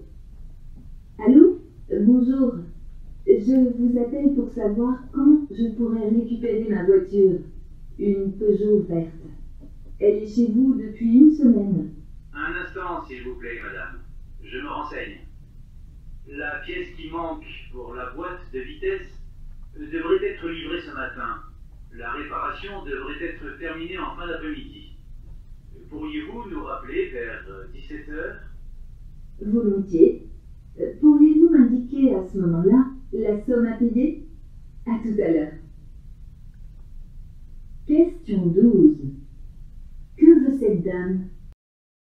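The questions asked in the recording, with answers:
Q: Que veut cette dame?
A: Savoir quand elle pourra récupérer sa voiture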